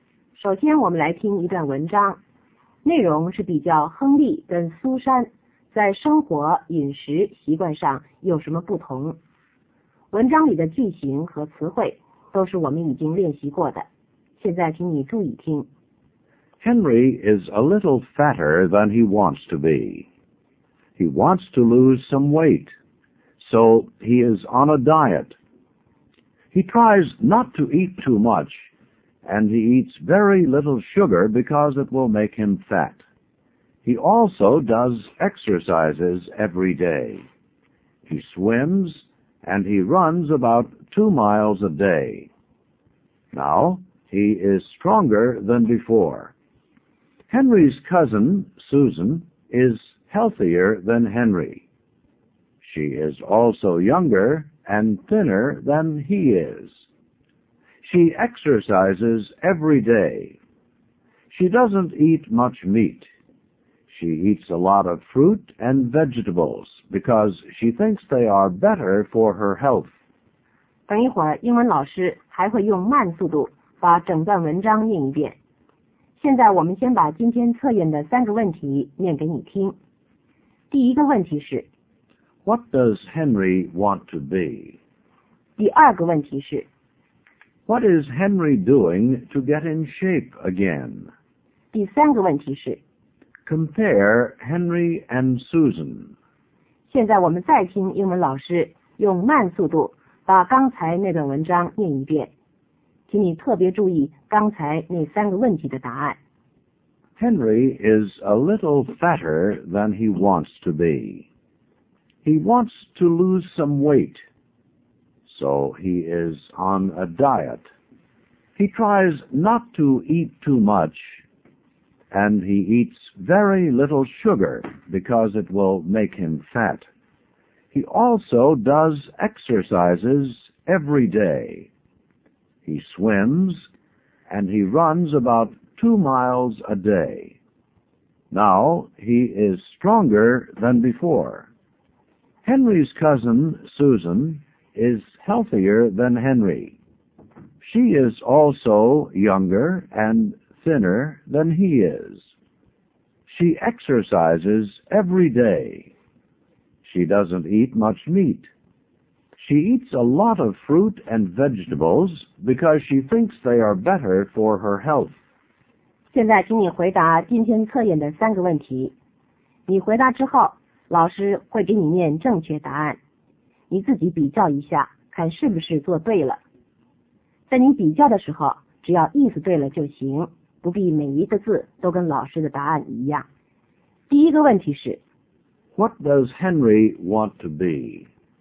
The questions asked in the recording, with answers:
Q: What does Henry want to be?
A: He wants to be thinner.

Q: What is Henry doing to get in shape again?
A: He tries not to eat too much.

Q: Compare Henry and Susan.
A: Henry is fatter and older. Susan is younger, thinner, and healthier.